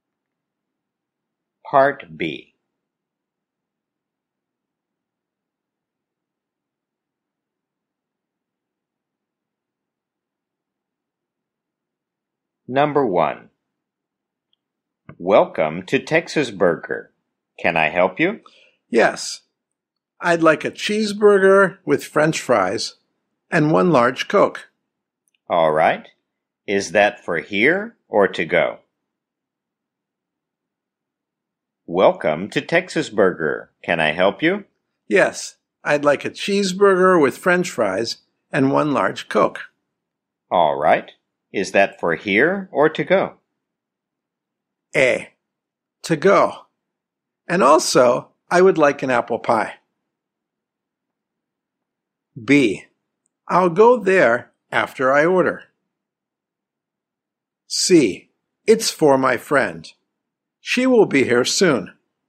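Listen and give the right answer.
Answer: A: To go. And also, I would like an apple pie.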